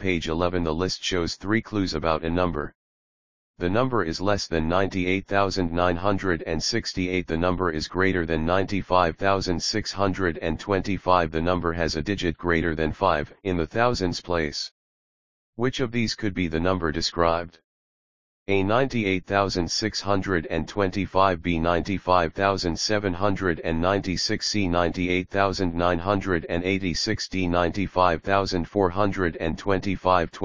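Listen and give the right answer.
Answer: A: 98,625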